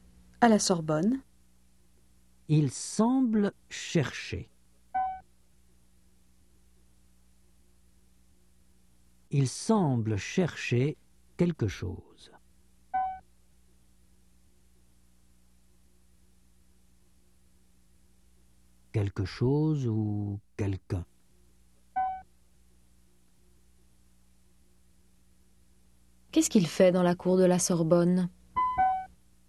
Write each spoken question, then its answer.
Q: Qu'est-ce qu'il fait dans la cour de la Sorbonne ?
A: Il cherche quelque chose ou quelqu'un.